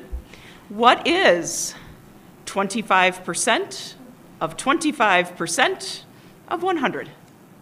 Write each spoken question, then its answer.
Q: What is 25%? Of 25% of 100.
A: I'm sorry, it's 6.25.